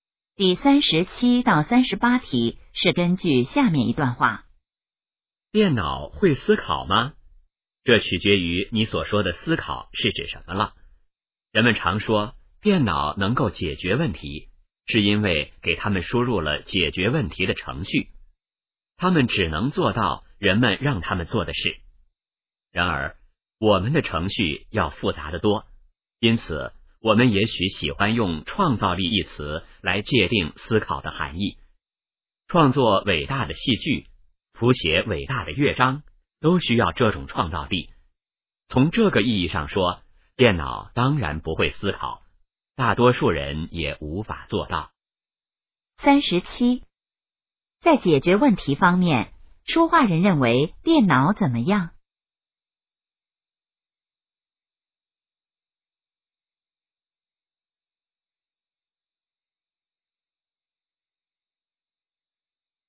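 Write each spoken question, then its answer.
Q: 在解决问题方面,说话人认为电脑怎么样?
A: 只能做人们让它们做的事

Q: 这段话主要谈什么?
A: 电脑会不会思考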